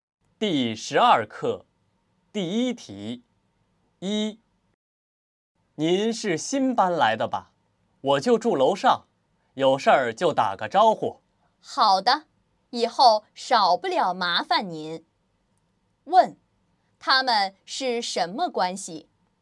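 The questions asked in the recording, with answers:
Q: 他们是什么关系?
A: 邻居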